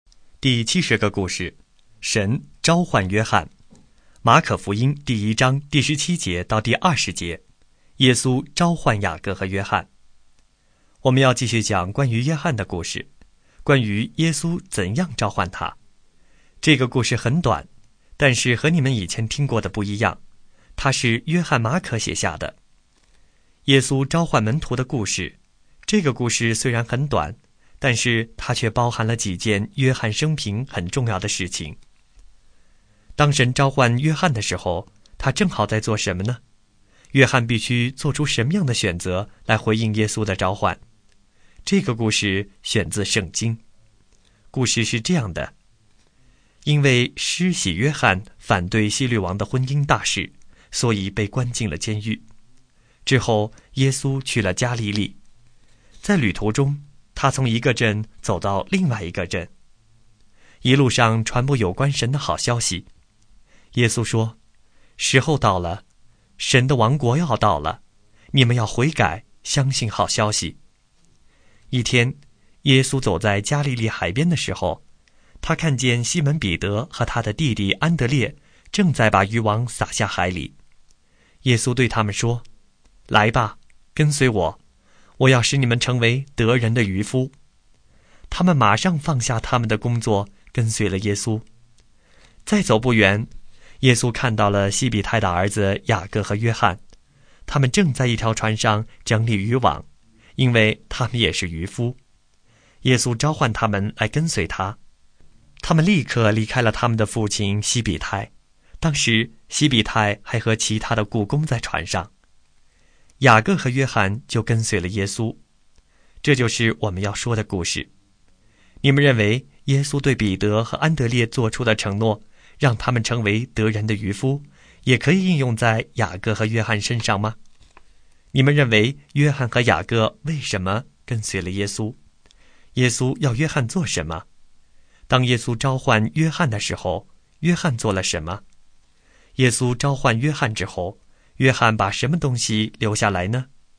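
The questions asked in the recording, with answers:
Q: 当神召唤约翰的时候,他正好在做什么呢?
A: 他正在船上整理渔网

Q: 当耶稣召唤约翰的时候,约翰做了什么?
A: 他立刻离开父亲,跟随了耶稣

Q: 耶稣召唤约翰之后,约翰把什么东西留下来呢?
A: 他的父亲西比泰(和船上的雇工)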